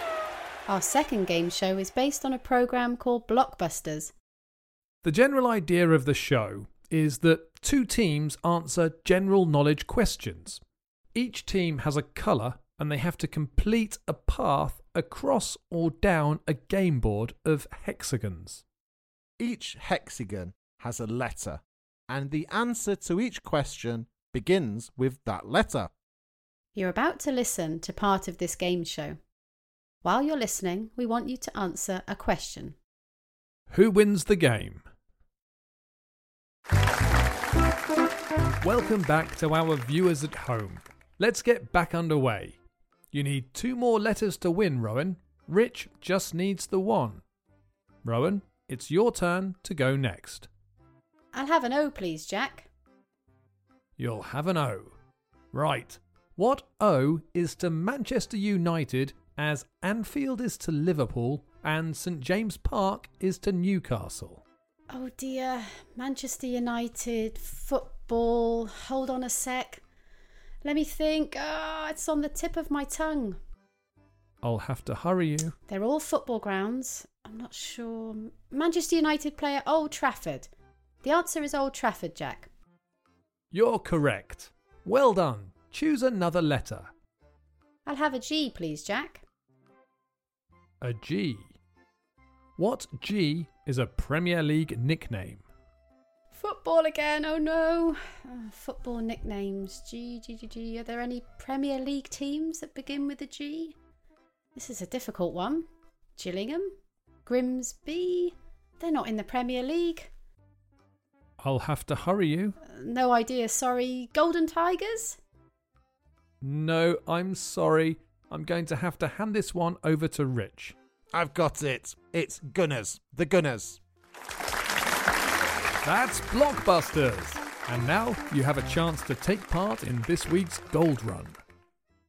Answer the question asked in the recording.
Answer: I won, thanks to my greater knowledge of Premier League nicknames.